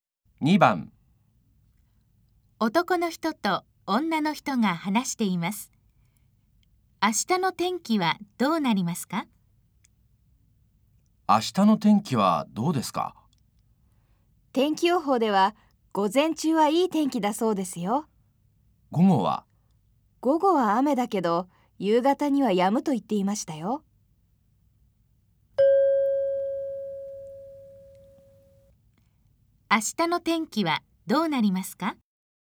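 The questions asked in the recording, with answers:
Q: 明日の天気はどうなりますか?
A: 午前中は晴れ、午後は雨、夕方には止む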